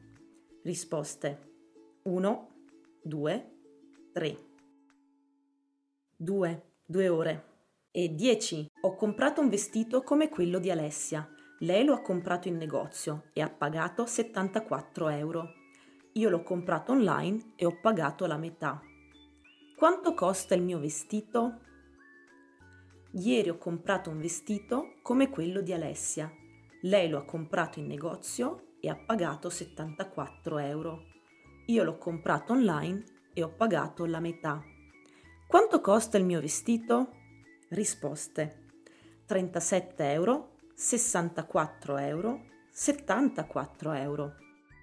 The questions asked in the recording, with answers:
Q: Quanto costa il mio vestito?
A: 37 euro, certo.